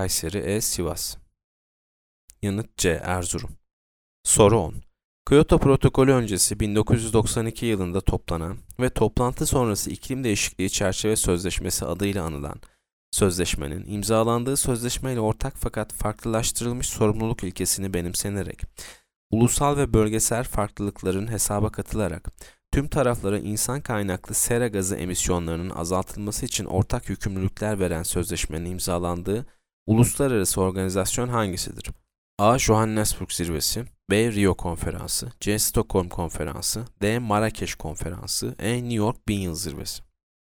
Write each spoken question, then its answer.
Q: Kyoto Protokolü öncesi 1992 yılında toplanan ve toplantı sonrası iklim değişikliği çerçeve sözleşmesi adıyla anılan sözleşmenin imzalandığı sözleşmeyle ortak fakat farklılaştırılmış sorumluluk ilkesini benimsenerek, ulusal ve bölgesel farklılıkların hesaba katılarak, tüm taraflara insan kaynaklı sera gazı emisyonlarının azaltılması için ortak yükümlülükler veren sözleşmenin imzalandığı uluslararası organizasyon hangisidir?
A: Yanıt B. Rio Konferansı.